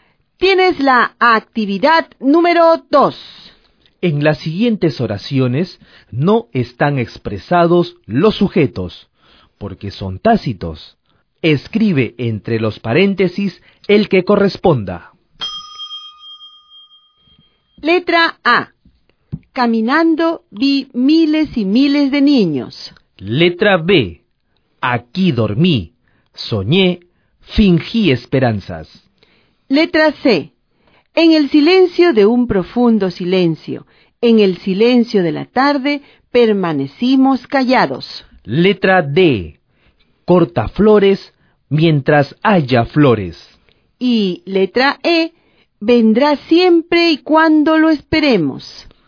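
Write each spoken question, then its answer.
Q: Letra A. Caminando vi miles y miles de niños.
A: yo

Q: Letra B. Aquí dormí, soñé, fingí esperanzas.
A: yo

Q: Letra C. En el silencio de un profundo silencio, en el silencio de la tarde, permanecimos callados.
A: nosotros

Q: Letra D. Corta flores mientras haya flores.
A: tú

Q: Y letra E. Vendrá siempre y cuando lo esperemos.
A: él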